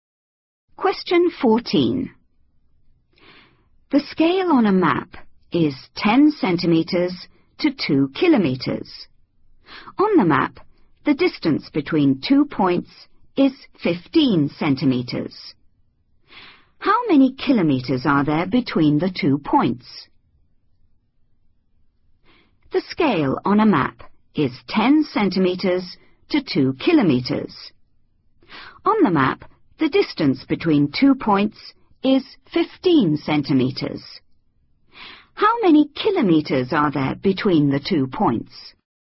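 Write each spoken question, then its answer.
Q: How many kilometers are there between the two points?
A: 3 km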